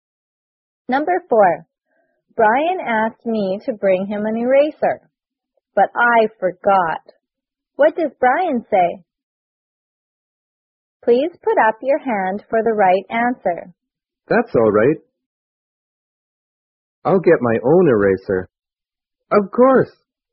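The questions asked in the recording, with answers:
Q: What does Brian say?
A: That's all right. I'll get my own eraser.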